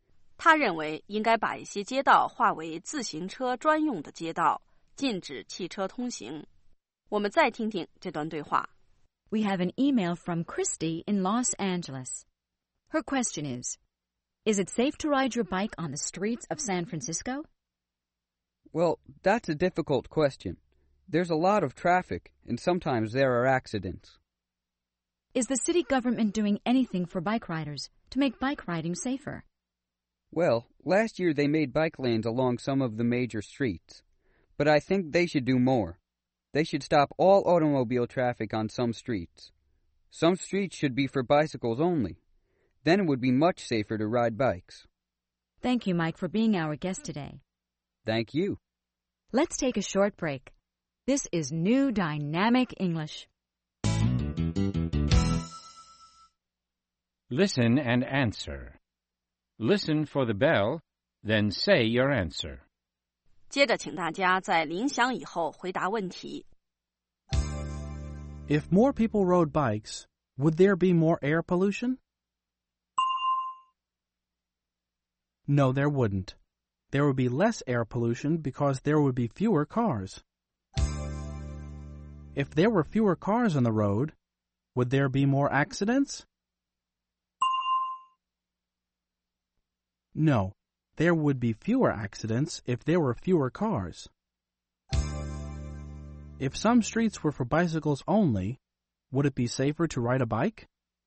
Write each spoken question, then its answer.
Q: If some streets were for bicycles only, would it be safer to ride a bike?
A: Yes, it would.It would be much safer.